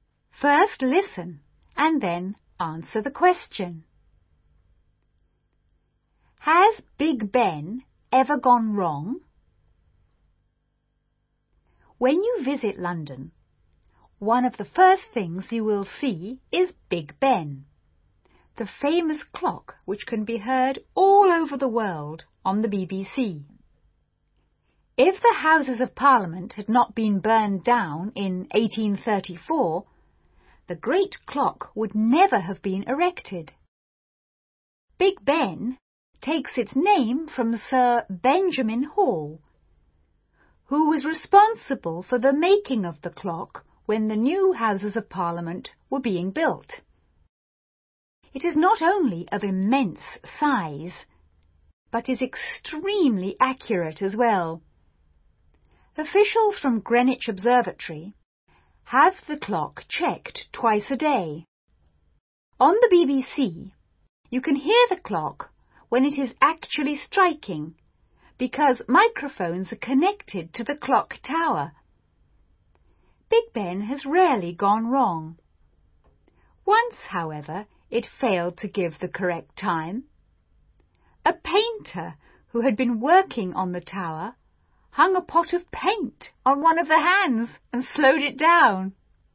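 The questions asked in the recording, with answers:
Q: Has Big Ben ever gone wrong?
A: Yes, once, when a painter hung a pot of paint on one of the hands and slowed it down.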